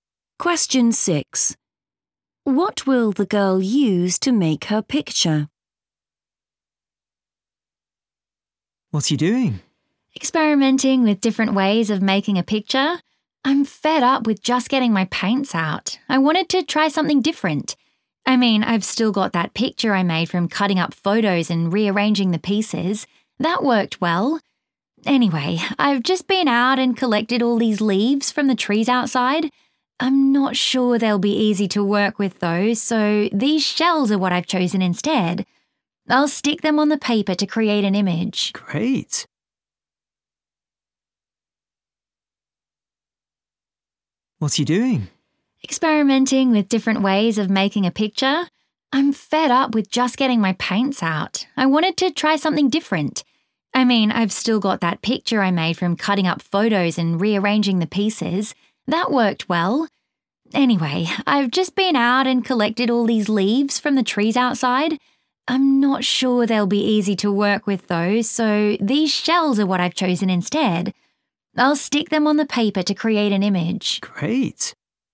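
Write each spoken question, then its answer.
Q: What will the girl use to make her picture?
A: shells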